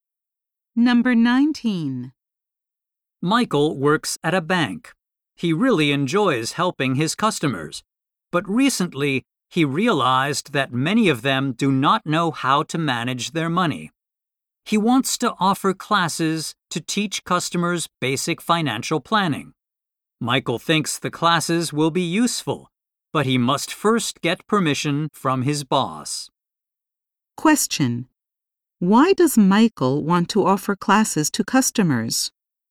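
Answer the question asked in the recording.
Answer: Many customers do not know how to manage their money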